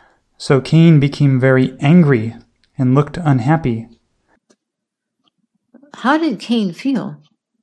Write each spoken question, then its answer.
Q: How did Cain feel?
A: Cain felt very angry.